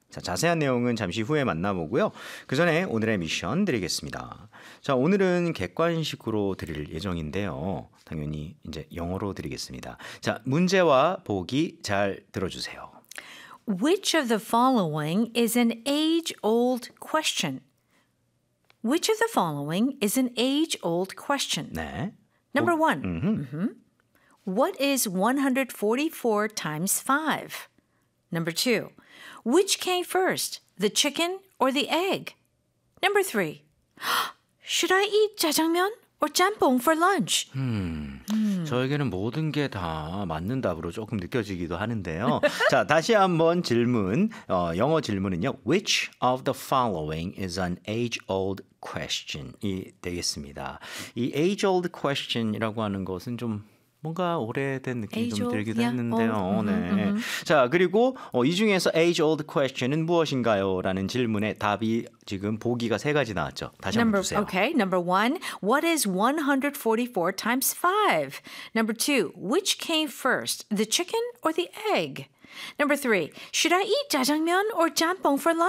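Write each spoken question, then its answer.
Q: Which of the following is an age-old question?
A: 2: Which came first, the chicken or the egg?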